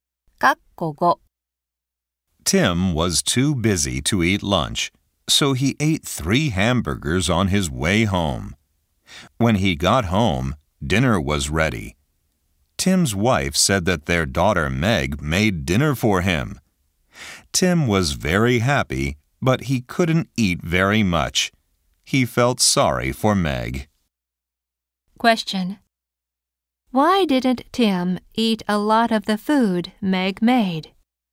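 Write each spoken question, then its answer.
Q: Why didn't Tim eat a lot of the food Meg made?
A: He had eaten 3 hamburgers on his way home.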